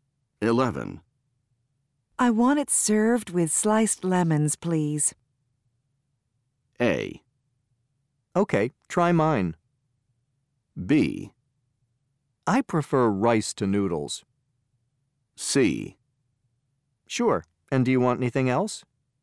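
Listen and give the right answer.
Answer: C: Sure, and do you want anything else?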